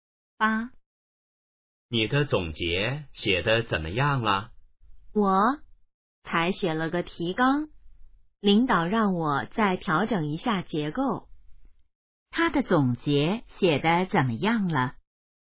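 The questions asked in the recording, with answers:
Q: 他的总结写得怎么样了?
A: 才写了提纲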